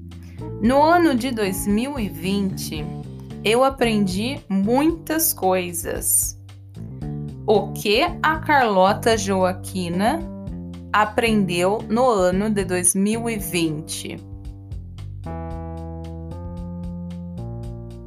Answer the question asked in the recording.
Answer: muitas coisas. Ela aprendeu muitas coisas.